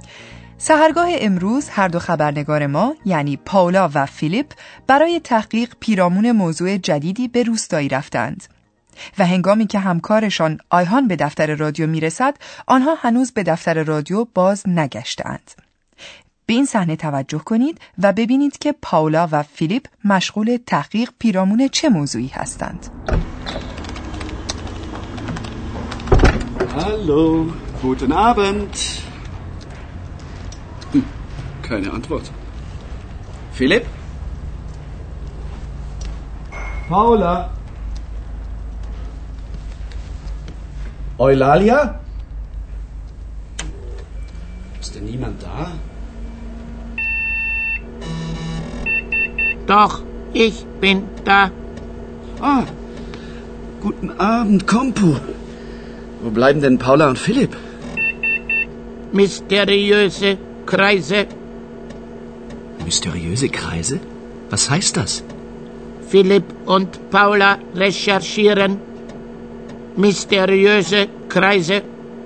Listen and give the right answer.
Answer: و هرگاه دقیق‌تر گفته باشیم، پیرامون کرایزه یعنی دایره ها و در اینجا سخن بر سر دایره های اسرارآمیز است.